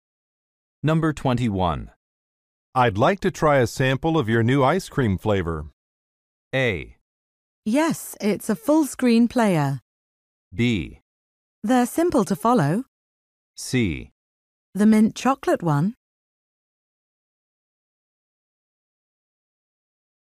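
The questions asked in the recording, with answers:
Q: I'd like to try a sample of your new ice cream flavor.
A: C: The mint chocolate one.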